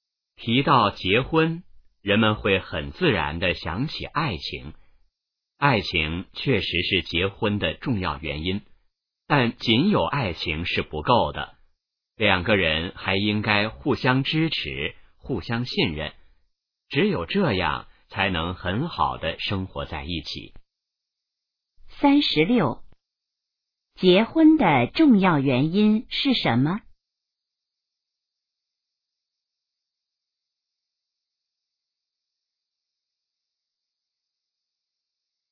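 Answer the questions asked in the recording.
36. 爱情
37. 互相支持,互相信任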